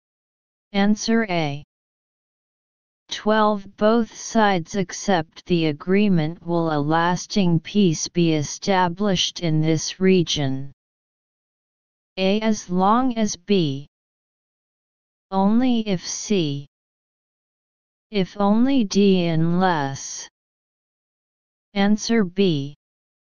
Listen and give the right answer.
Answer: Answer B.